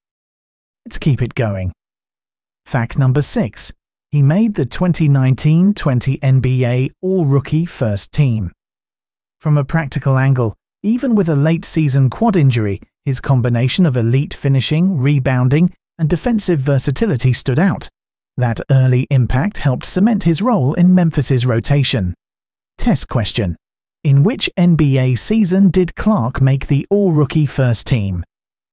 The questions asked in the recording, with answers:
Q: In which NBA season did Clark make the All-Rookie First Team?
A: Correct answer. 2019-20.